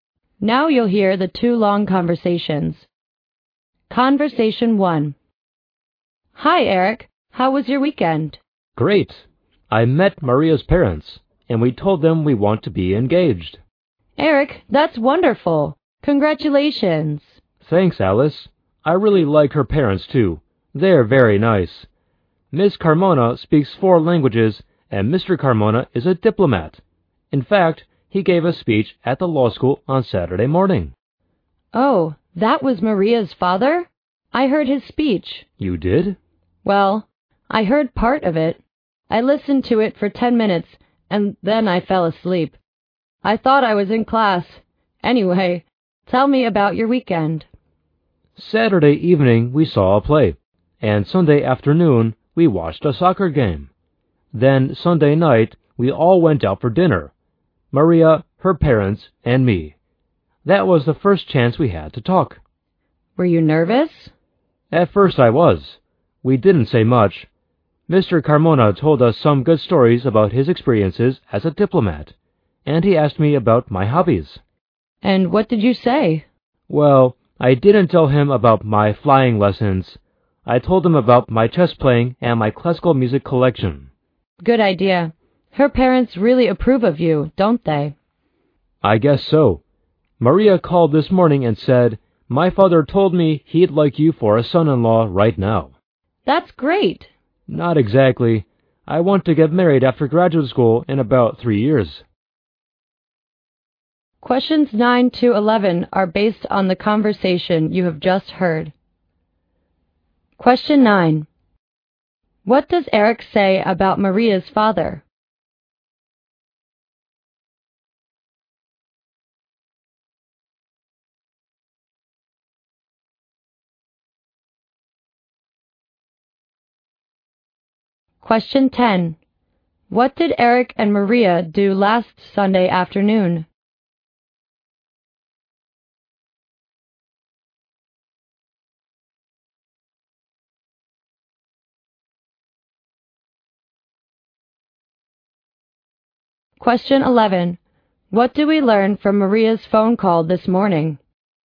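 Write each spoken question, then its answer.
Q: What does Eric say about Maria's father?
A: He is a diplomat who gave a speech at the law school.

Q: What did Eric and Maria do last Sunday afternoon?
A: They watched a soccer game.

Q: What do we learn from Maria's phone call this morning?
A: Her father would like Eric as a son-in-law right now.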